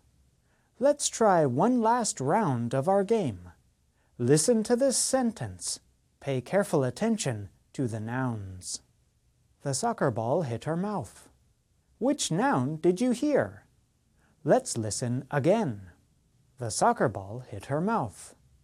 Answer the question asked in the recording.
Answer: The answer is mouth.